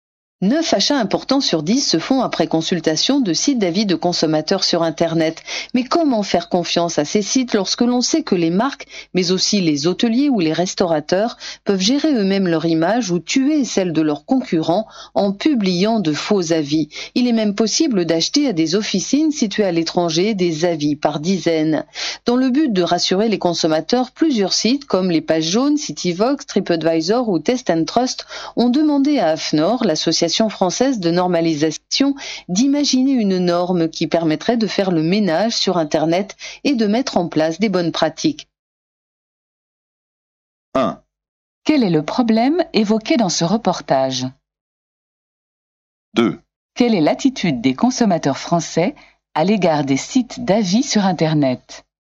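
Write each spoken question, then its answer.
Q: Quel est le problème évoqué dans ce reportage?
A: Les faux avis de consommateurs publiés sur Internet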